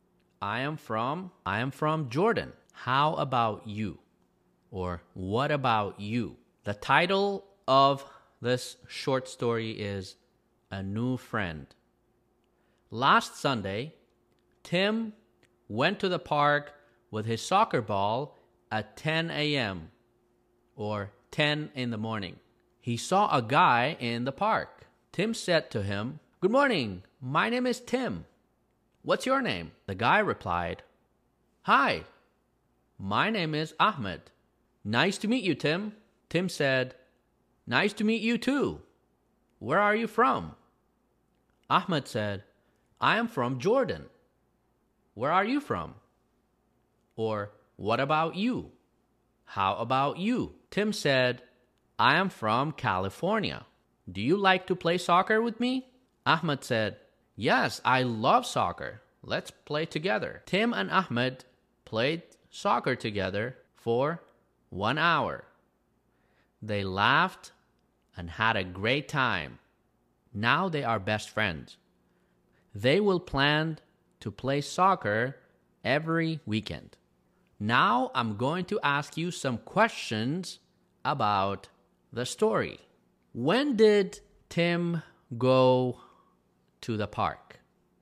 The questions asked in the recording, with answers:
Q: When did Tim go to the park?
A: On Sunday. Last Sunday.